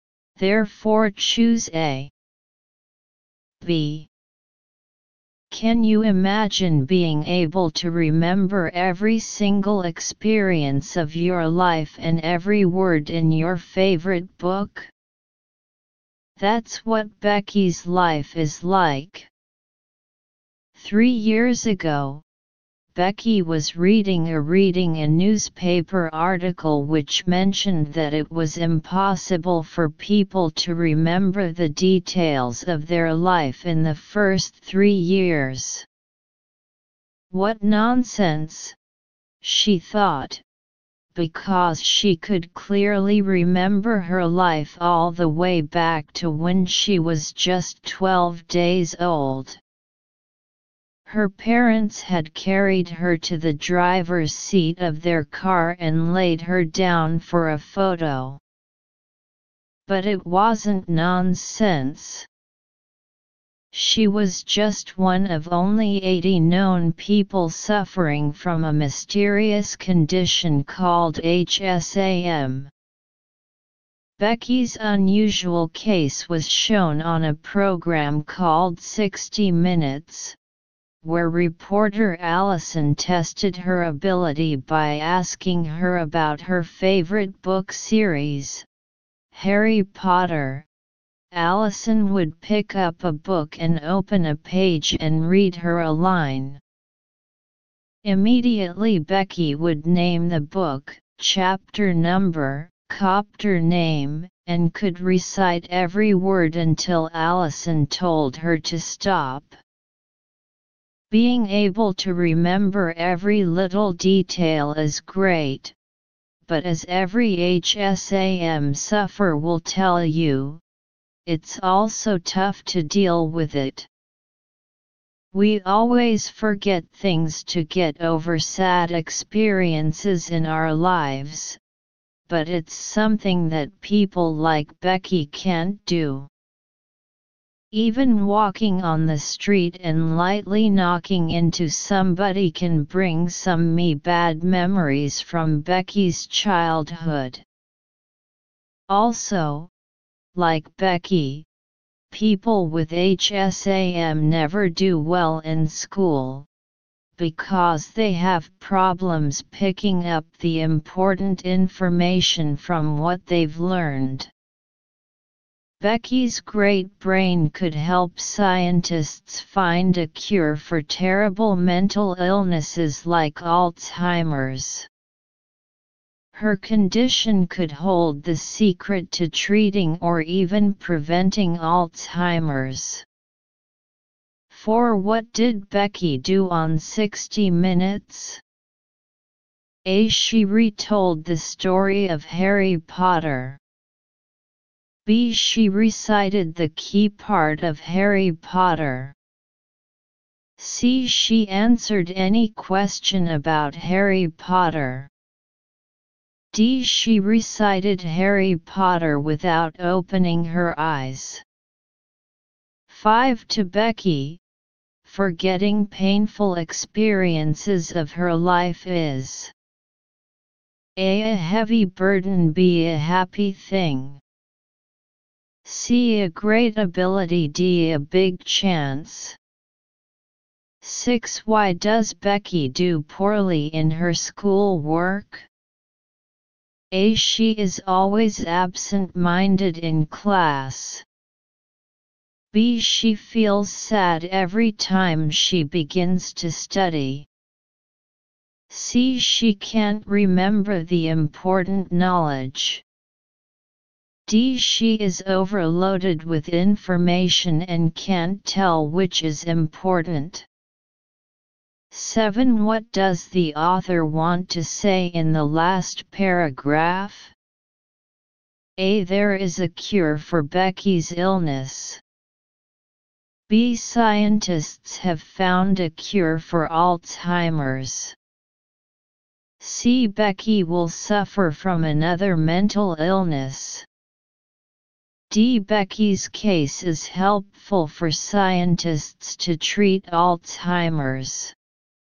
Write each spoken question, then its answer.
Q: Why does Becky do poorly in her school work?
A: 6. D.

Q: What does the author want to say in the last paragraph?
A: 7. D.